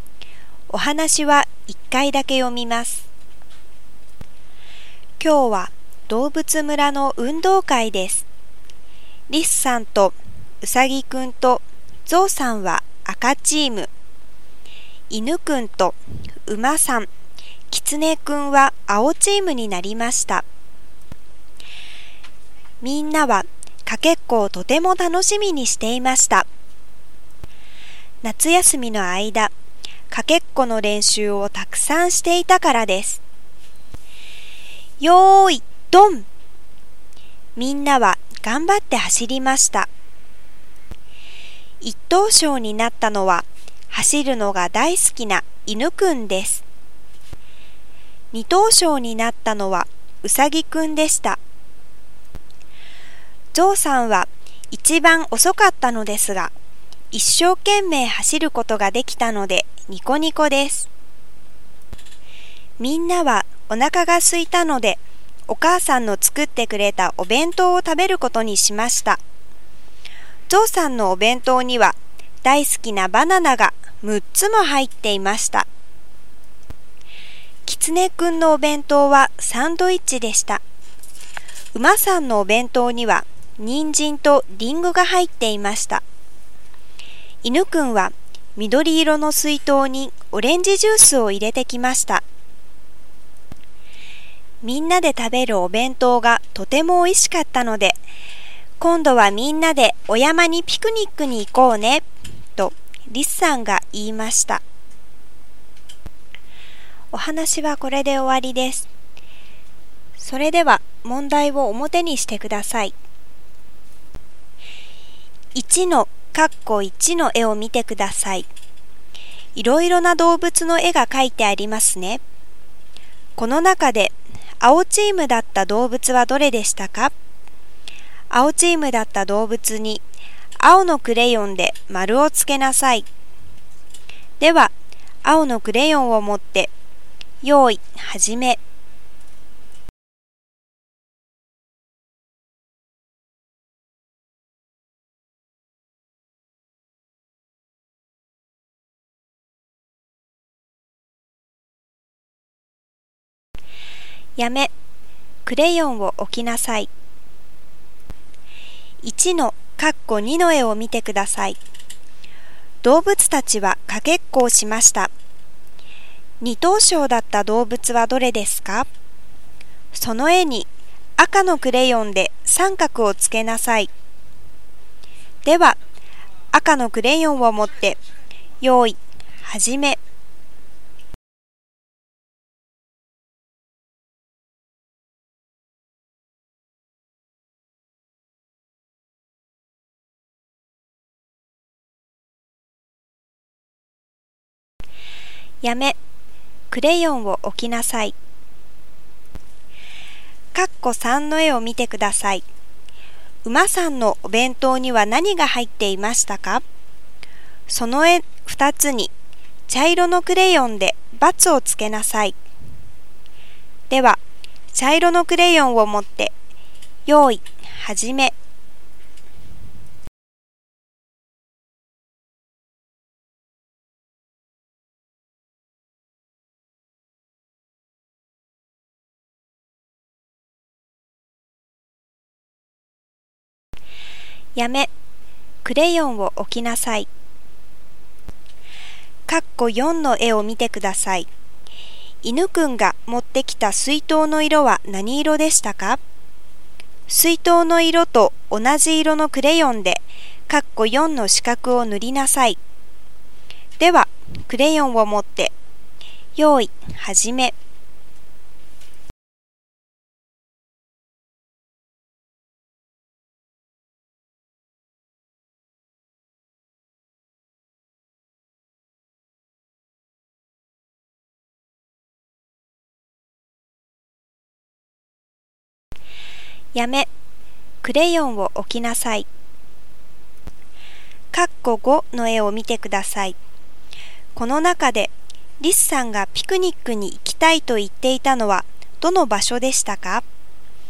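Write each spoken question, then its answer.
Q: この中で青チームだった動物はどれでしたか?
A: 犬くん、馬さん、キツネくん

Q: 二等賞だった動物はどれですか?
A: うさぎくん

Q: 馬さんのお弁当には何が入っていましたか?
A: 人参とリンゴ

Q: 犬くんが持ってきた水筒の色は何色でしたか?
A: 緑色

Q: この中でリスさんがピクニックに行きたいと言っていたのはどの場所でしたか?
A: お山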